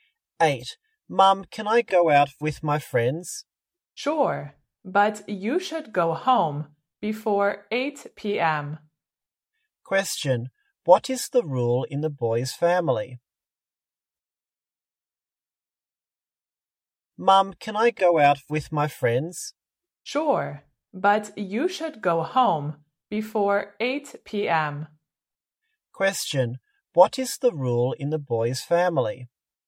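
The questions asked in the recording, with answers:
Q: what is the rule in the boy's family?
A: He should go home before 8 p.m.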